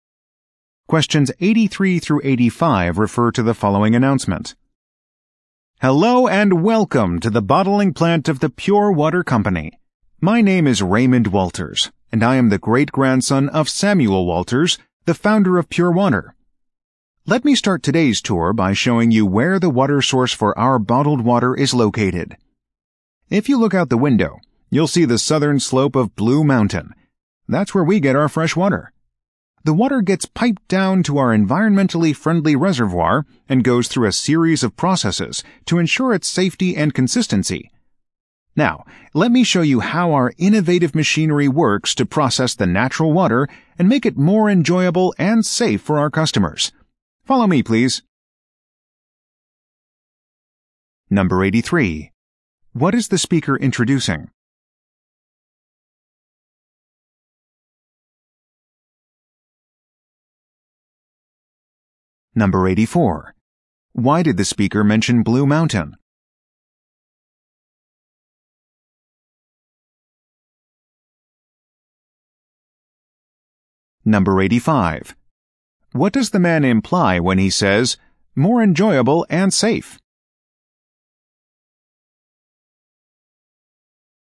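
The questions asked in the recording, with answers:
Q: What is the speaker introducing?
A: A tour of the Pure Water bottling plant

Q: Why did the speaker mention Blue Mountain?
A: It is the source of the company's water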